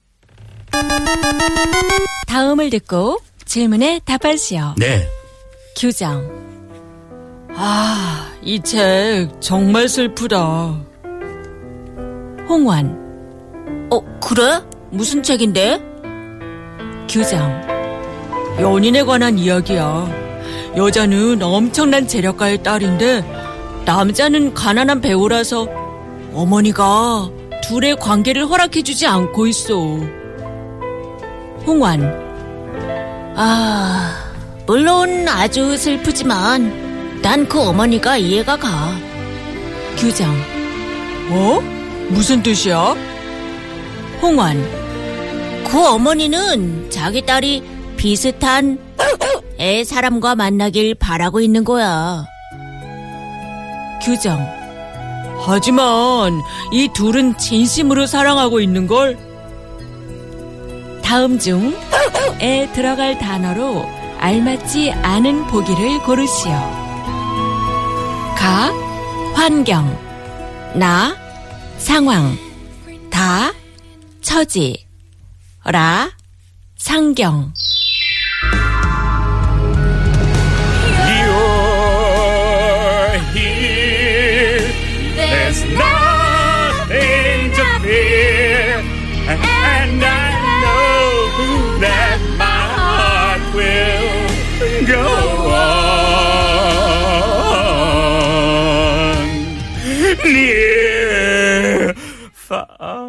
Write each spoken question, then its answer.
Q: 다음 중 에 들어갈 단어로 알맞지 않은 보기를 고르시오.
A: La. 자기 딸의 비슷한 상경에 사람과 만나길 바라고 있는 거야?